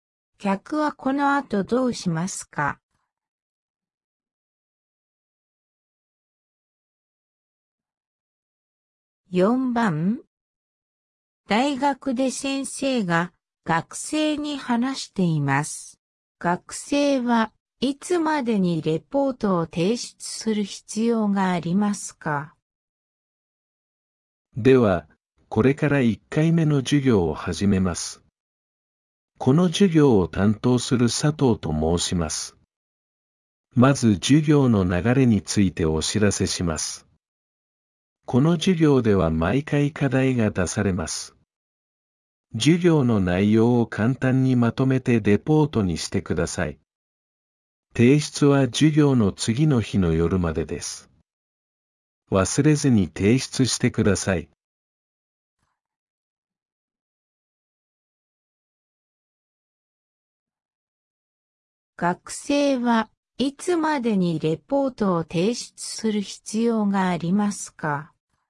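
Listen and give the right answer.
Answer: 授業の次の日の夜まで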